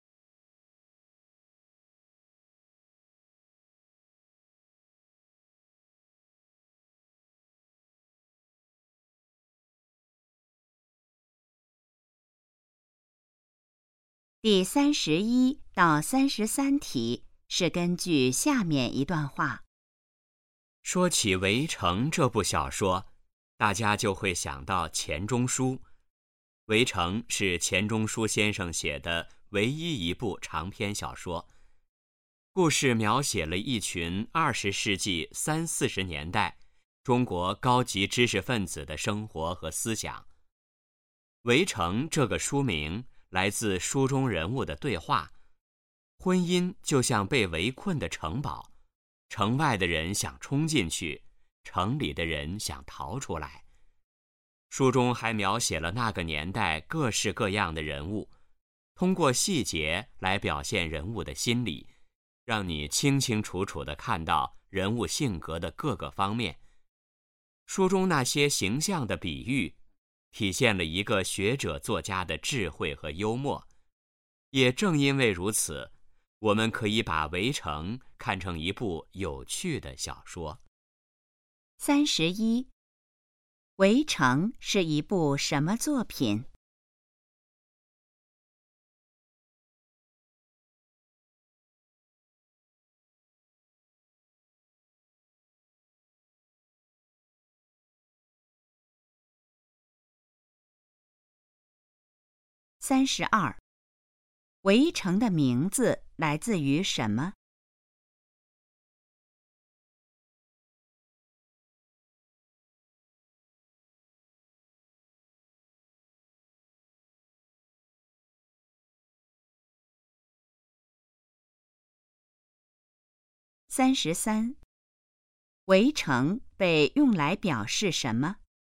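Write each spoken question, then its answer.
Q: 《围城》是一部什么作品?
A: 长篇小说

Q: 《围城》的名字来自于什么?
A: 书中人物的对话

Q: 《围城》被用来表示什么?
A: 婚姻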